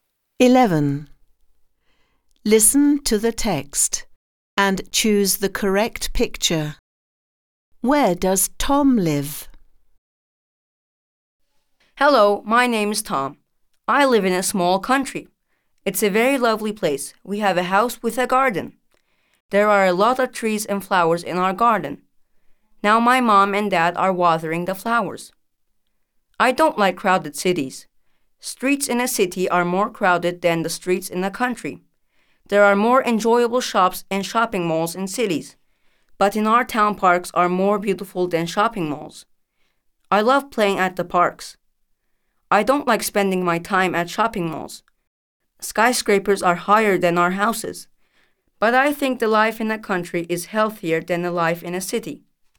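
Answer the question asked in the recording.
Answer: In the country (a house with a garden)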